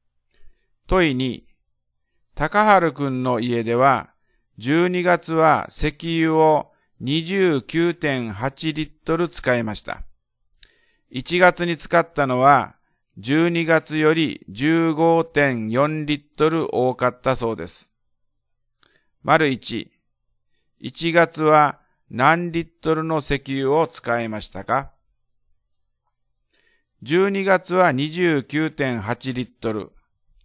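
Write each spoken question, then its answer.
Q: 1月は何リットルの石油を使いましたか?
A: 45.2リットル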